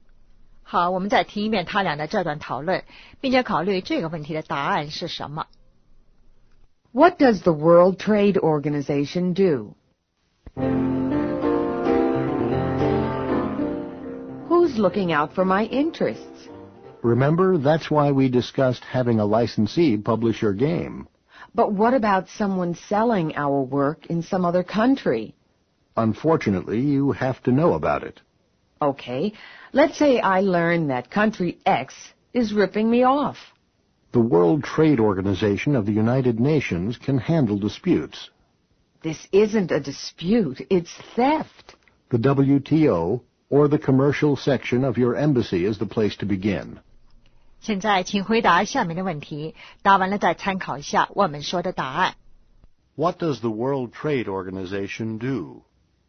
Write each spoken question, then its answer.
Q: What does the World Trade Organization do?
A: Handles disputes.